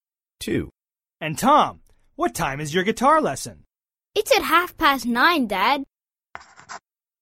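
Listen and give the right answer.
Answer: 9:30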